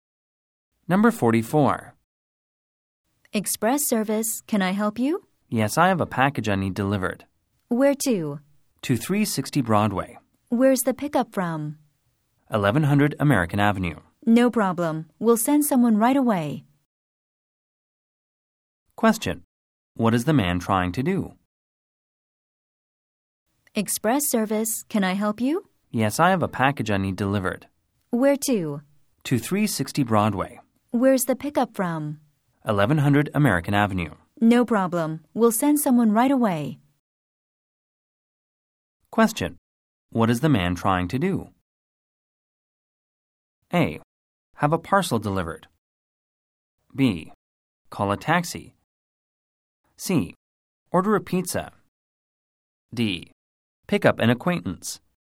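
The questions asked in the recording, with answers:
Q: What is the man trying to do?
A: A: Have a parcel delivered.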